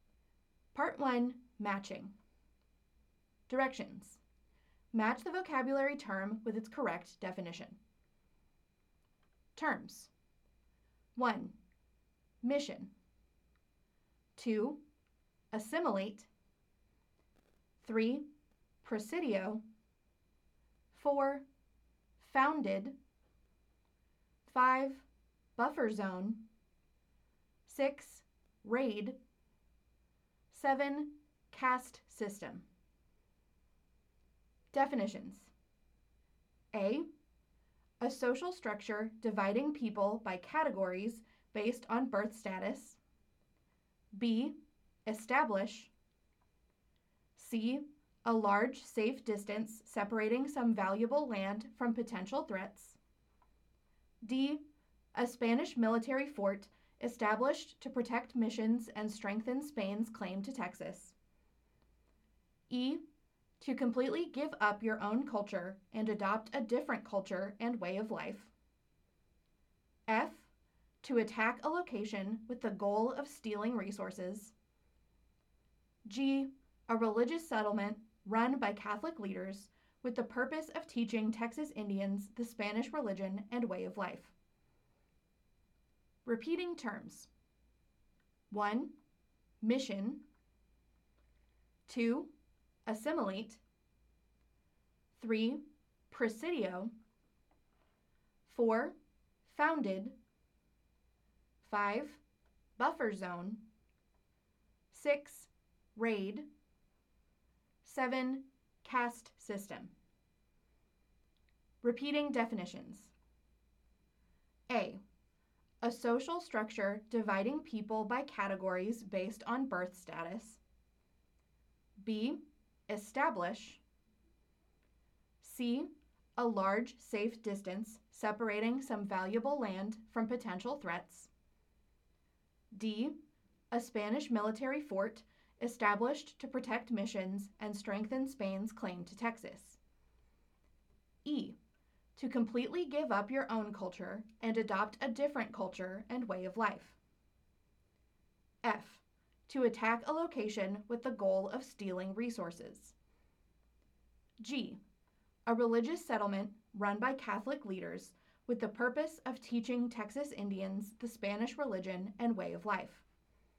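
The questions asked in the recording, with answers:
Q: Mission.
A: G: A religious settlement run by Catholic leaders with the purpose of teaching Texas Indians the Spanish religion and way of life.

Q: Assimilate.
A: E: To completely give up your own culture and adopt a different culture and way of life.

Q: Presidio.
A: D: A Spanish military fort established to protect missions and strengthen Spain's claim to Texas.

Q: Founded.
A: B: Establish.

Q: Buffer zone.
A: C: A large safe distance separating some valuable land from potential threats.

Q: Raid.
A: F: To attack a location with the goal of stealing resources.

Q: Caste system.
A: A: A social structure dividing people by categories based on birth status.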